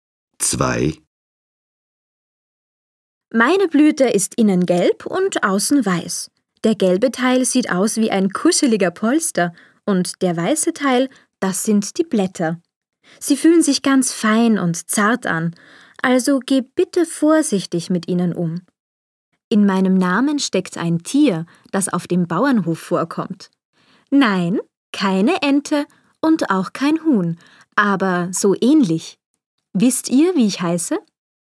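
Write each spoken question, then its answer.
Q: Wisst ihr, wie ich heiße?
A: Gänseblümchen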